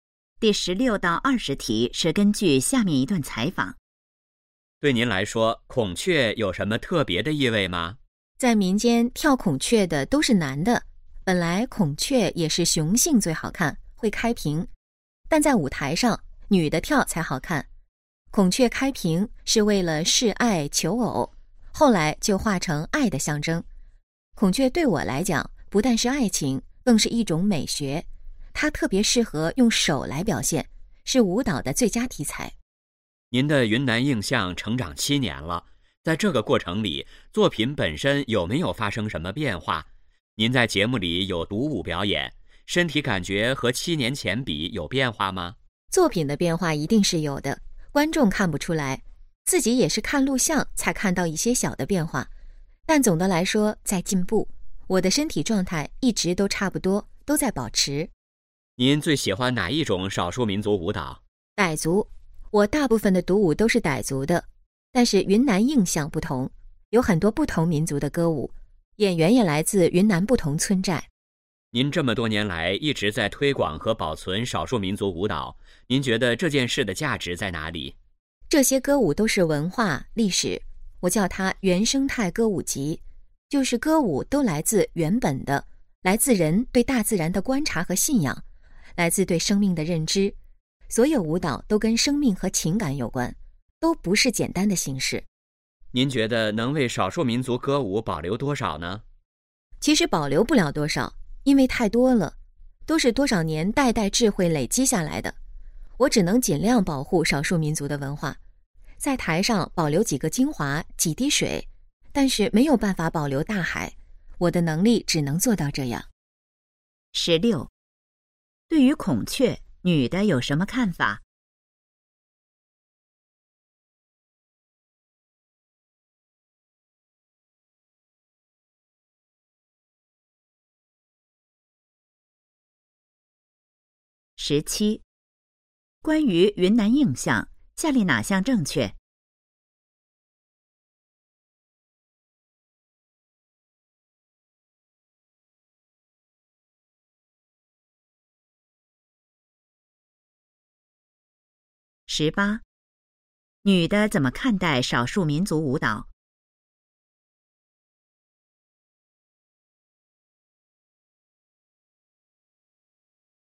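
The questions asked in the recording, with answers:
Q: 对于孔雀女的有什么看法?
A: 不但代表爱情,更是一种美学,是舞蹈的最佳题材

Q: 女的怎么看待少数民族舞蹈?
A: 是文化历史,都跟生命和情感有关

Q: 女的说没有办法保留大海是什么意思?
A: 少数民族歌舞太多,只能保留少数精华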